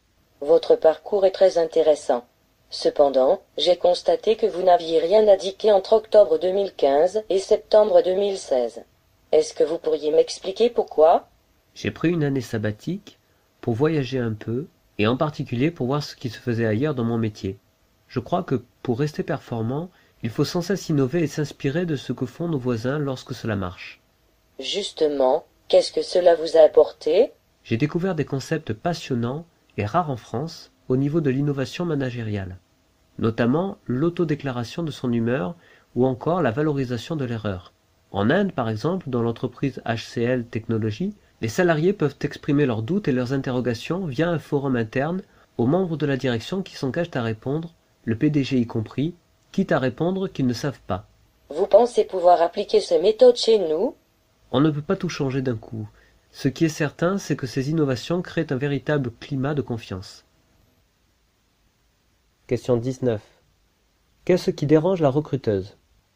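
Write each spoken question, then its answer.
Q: Qu'est-ce qui dérange la recruteuse?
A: Le candidat n'a rien indiqué sur son CV entre octobre 2015 et septembre 2016 (une période sans explication).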